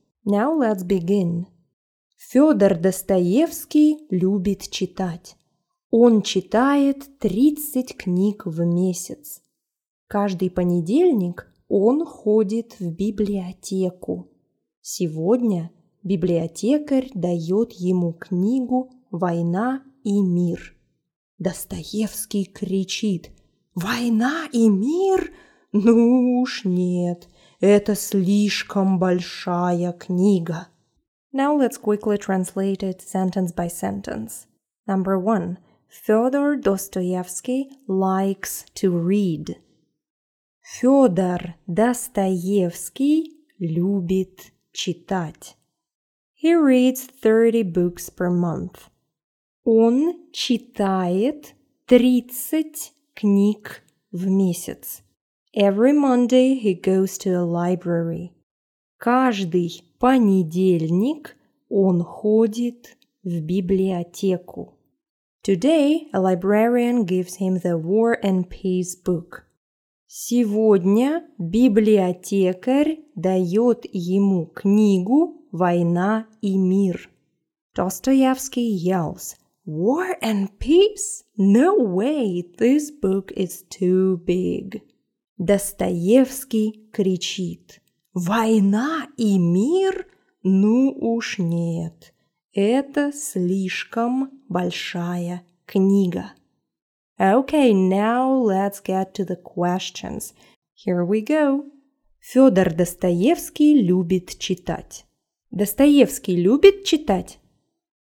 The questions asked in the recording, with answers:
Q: Достоевский любит читать?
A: Да, он любит читать.